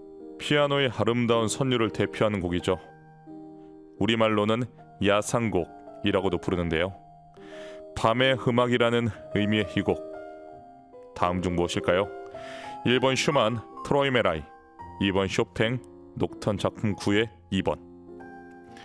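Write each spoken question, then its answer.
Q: 밤의 음악이라는 의미의 이 곡. 다음 중 무엇일까요?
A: 2번: 쇼팽, 녹턴 작품 9의 2번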